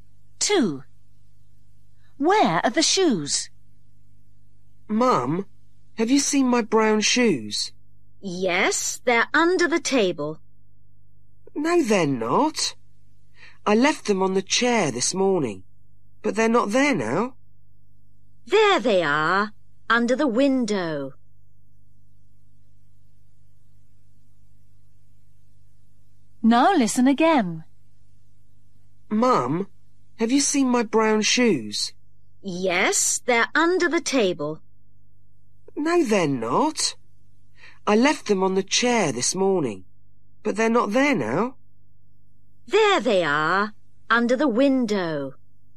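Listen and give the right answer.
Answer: Under the window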